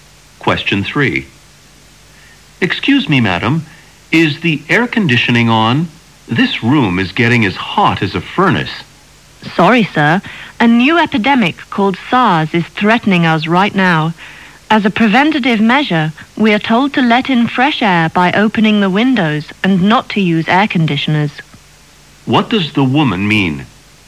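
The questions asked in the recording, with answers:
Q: What does the woman mean?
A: The air conditioning is off to prevent SARS; windows are opened for fresh air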